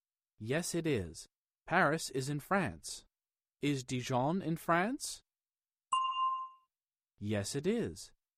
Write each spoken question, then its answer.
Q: Is Dijon in France?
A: Yes, it is.